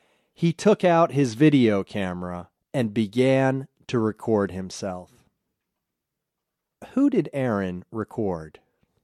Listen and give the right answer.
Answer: He recorded himself.